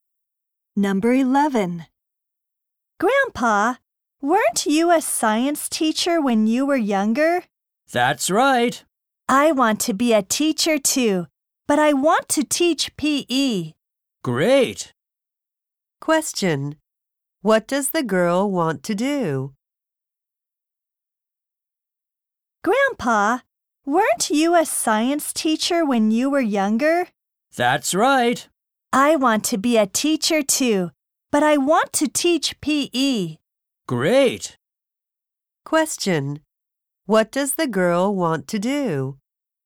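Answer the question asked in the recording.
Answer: Become a PE teacher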